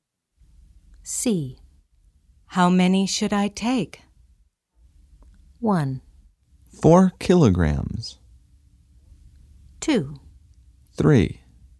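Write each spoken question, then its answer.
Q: How many should I take?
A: 2: 3.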